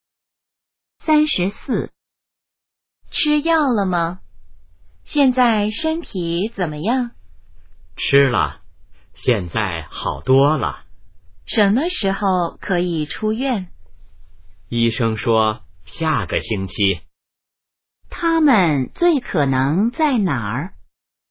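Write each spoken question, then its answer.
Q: 他们最可能在哪儿?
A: 医院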